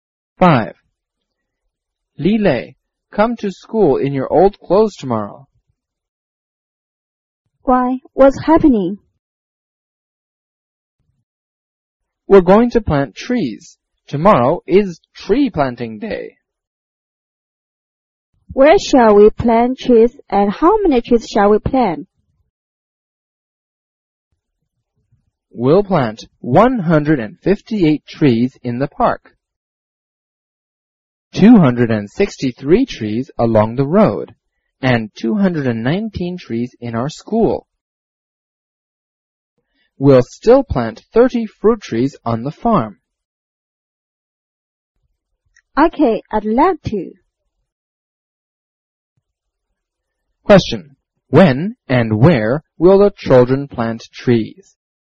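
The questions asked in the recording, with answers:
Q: When and where will the children plant trees?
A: Tomorrow (Tree Planting Day), in the park, along the road, in their school and on the farm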